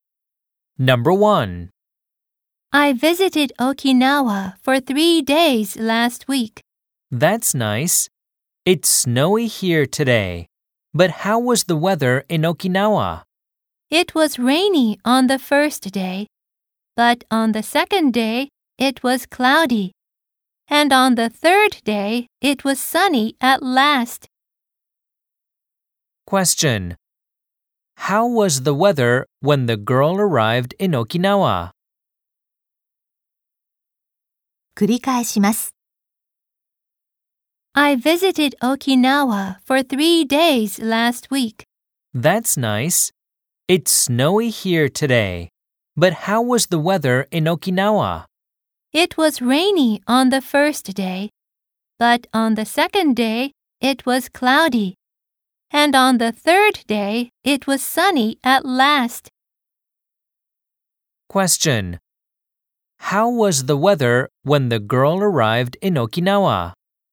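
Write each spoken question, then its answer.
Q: How was the weather when the girl arrived in Okinawa?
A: It was rainy.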